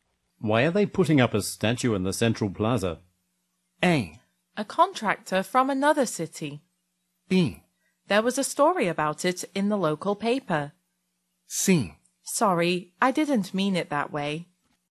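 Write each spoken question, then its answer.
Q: Why are they putting up a statue in the Central Plaza?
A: B: There was a story about it in the local paper.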